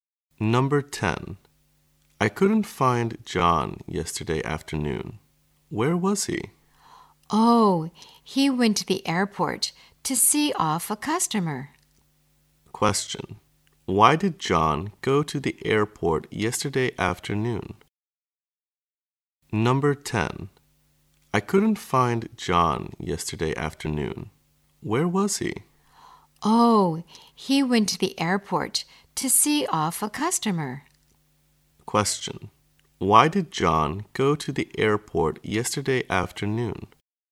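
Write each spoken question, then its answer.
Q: why did John go to the airport yesterday afternoon?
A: To see off a customer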